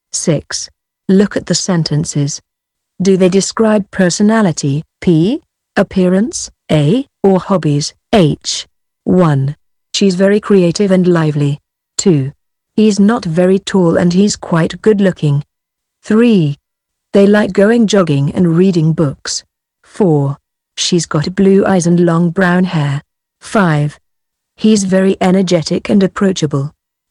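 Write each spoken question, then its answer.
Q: She's very creative and lively.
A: P: personality

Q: He's not very tall and he's quite good looking.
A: A: appearance

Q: They like going jogging and reading books.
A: H: hobbies

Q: She's got blue eyes and long brown hair.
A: A: appearance

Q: He's very energetic and approachable.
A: P: personality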